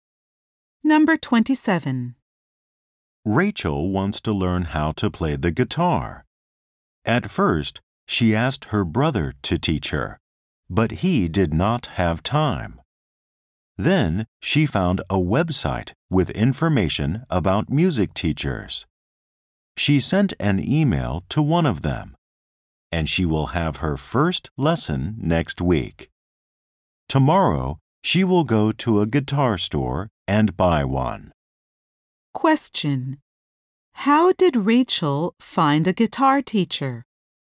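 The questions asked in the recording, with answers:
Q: How did Rachel find a guitar teacher?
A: She found one on a website about music teachers.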